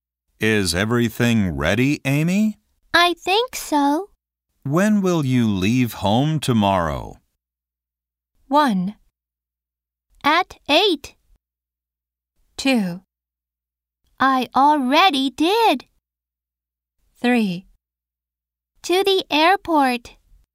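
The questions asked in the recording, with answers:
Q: When will you leave home tomorrow?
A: 1: At 8.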